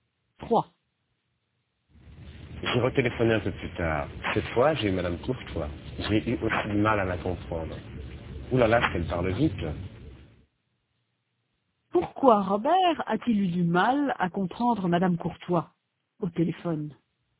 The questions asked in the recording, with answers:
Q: Pourquoi Robert a-t-il eu du mal à comprendre Madame Courtois au téléphone?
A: Parce qu'elle parle vite.